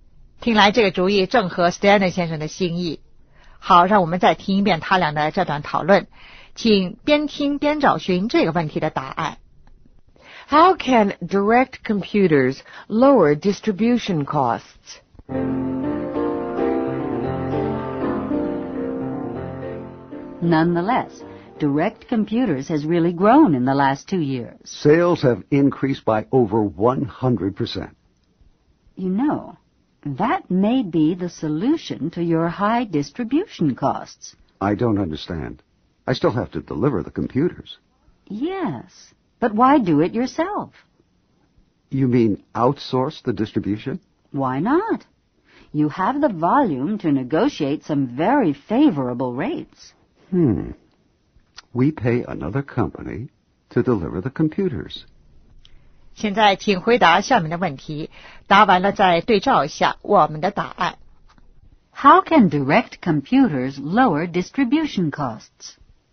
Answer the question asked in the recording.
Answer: By outsourcing the distribution.